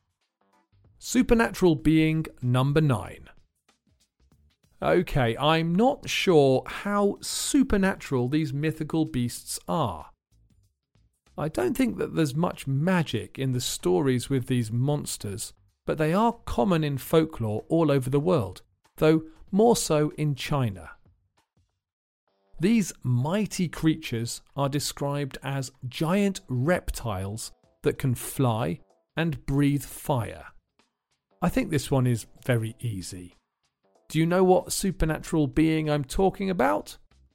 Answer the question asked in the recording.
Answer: I'm talking about dragons, of course.